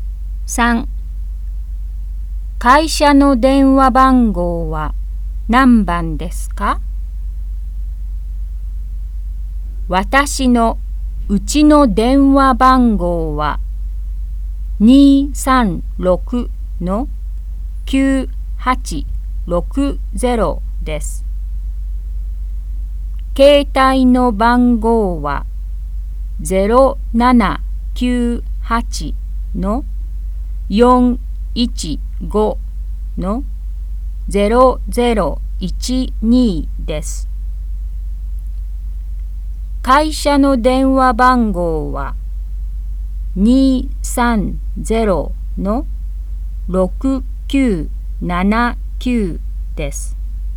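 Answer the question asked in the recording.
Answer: 230-6979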